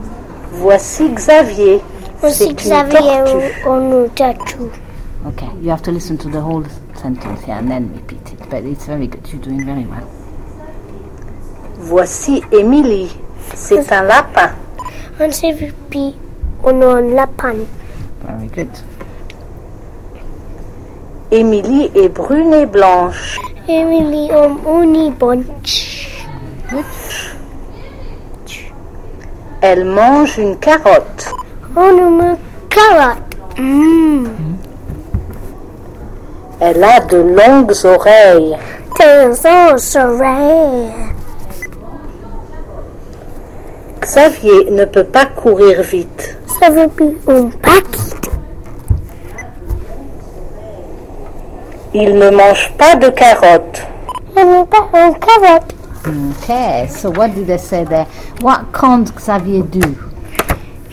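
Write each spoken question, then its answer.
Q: What can't Xavier do?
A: Run fast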